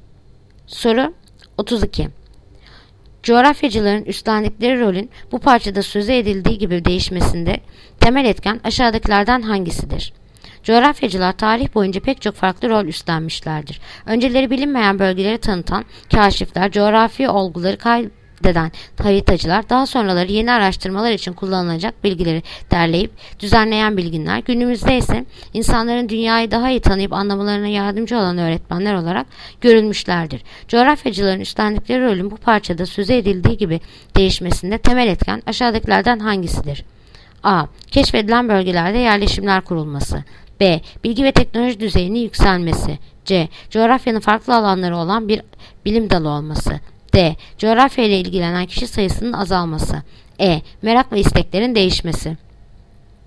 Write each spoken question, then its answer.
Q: Coğrafyacıların üstlendikleri rolün bu parçada sözü edildiği gibi değişmesinde temel etken aşağıdakilerden hangisidir?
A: Yanıt: Bursa. Bilgi ve teknoloji düzeyinin yükselmesi.